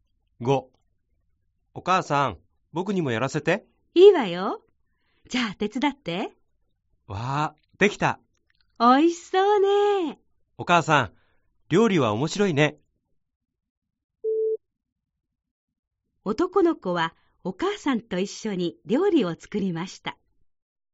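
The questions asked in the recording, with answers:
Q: 男の子はお母さんと一緒に料理を作りました。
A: ○(正しい)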